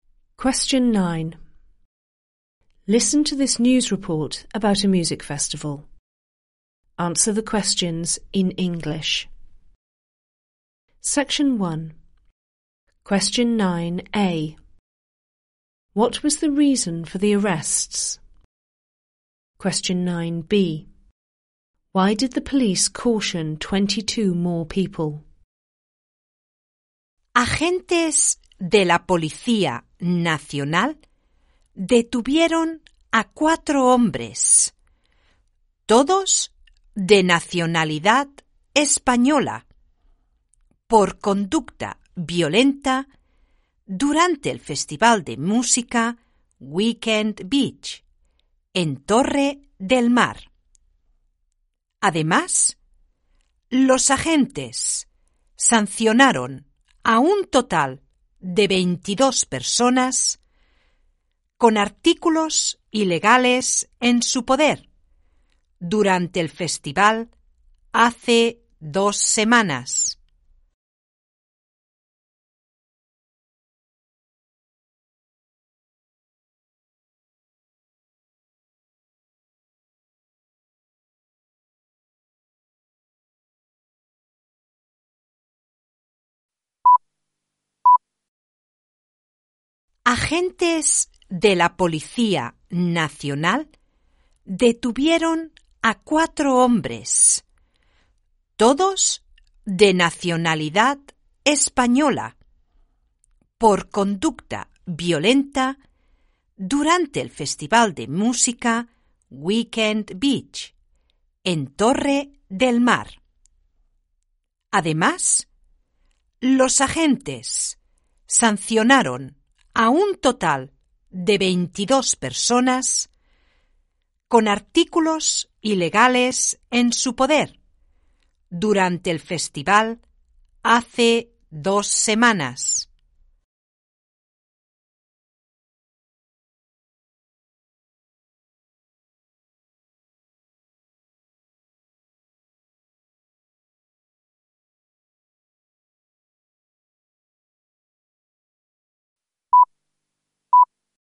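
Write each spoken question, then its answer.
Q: What was the reason for the arrests?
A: Violent behaviour

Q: Why did the police caution 22 more people?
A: They had illegal items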